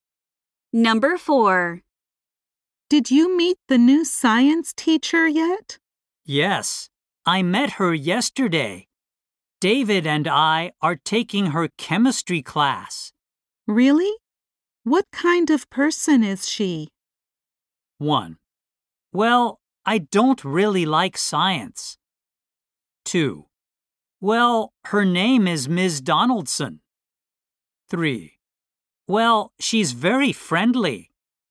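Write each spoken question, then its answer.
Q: Really? What kind of person is she?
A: 3: Well, she's very friendly.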